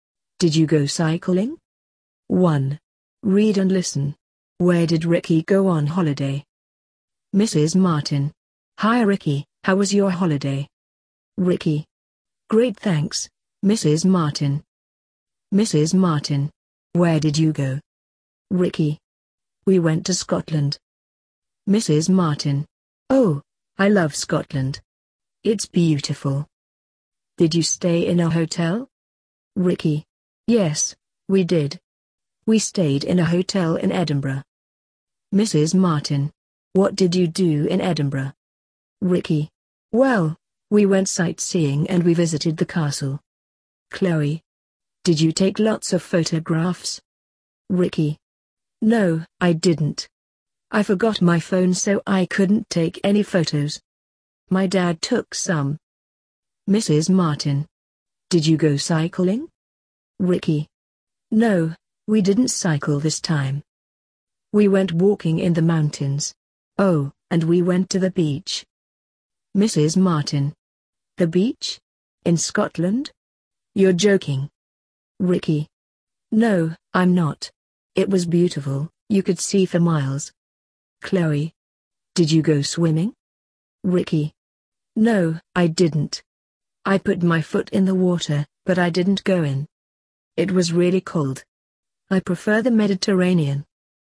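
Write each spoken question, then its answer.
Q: Where did Ricky go on holiday?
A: Scotland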